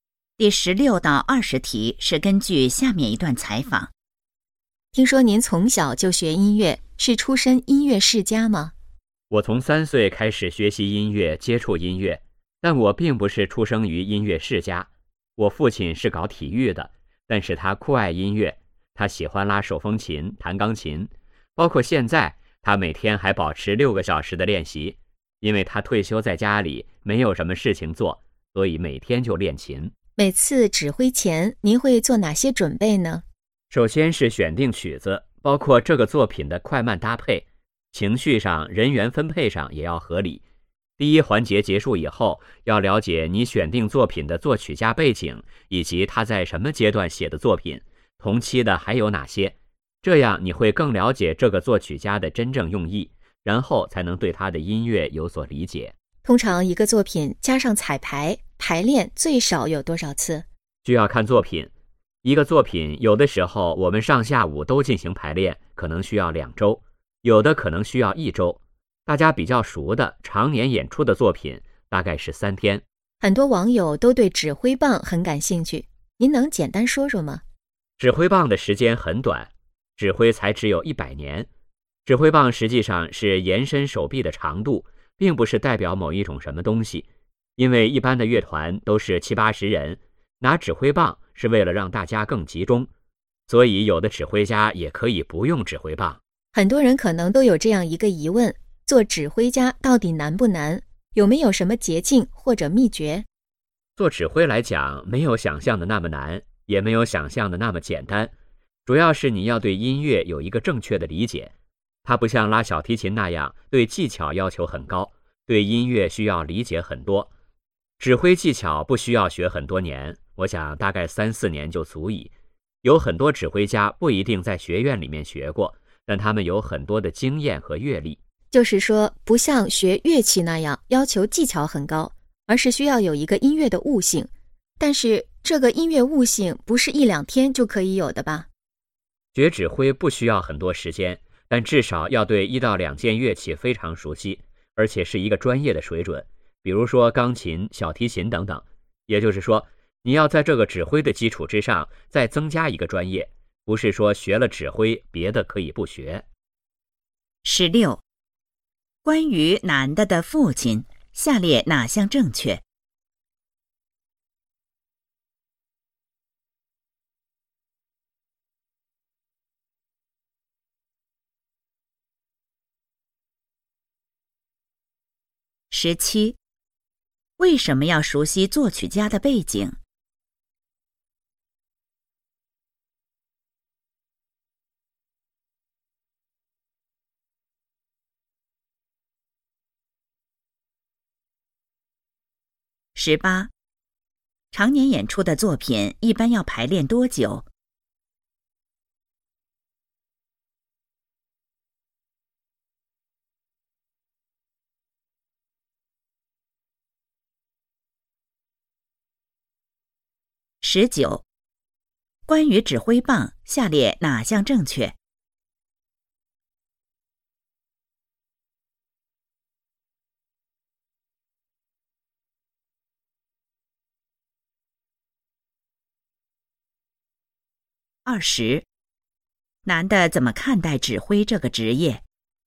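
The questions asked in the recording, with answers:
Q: 为什么要熟悉作曲家的背景?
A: 为了更了解作曲家的真正用意

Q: 常年演出的作品一般要排练多久?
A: 大概三天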